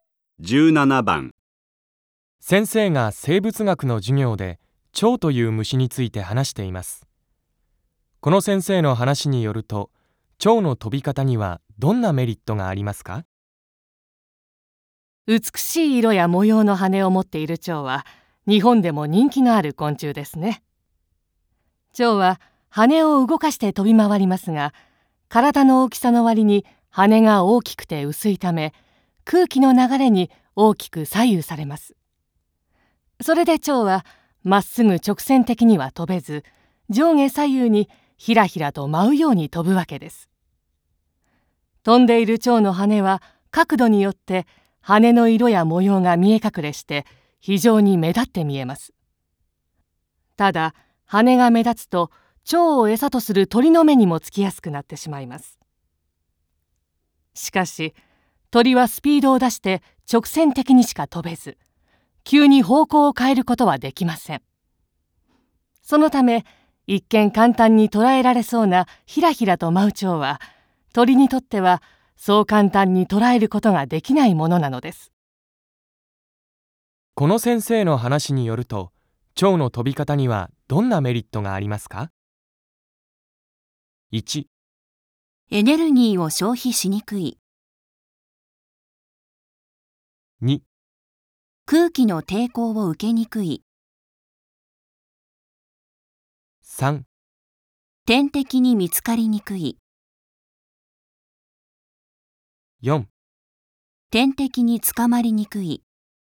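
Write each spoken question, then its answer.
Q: この先生の話によると、蝶の飛び方にはどんなメリットがありますか?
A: 4: 天敵に捕まりにくい。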